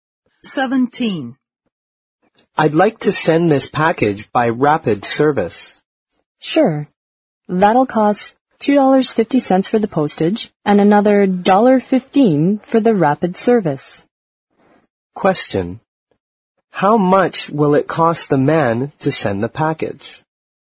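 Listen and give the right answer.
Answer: $3.65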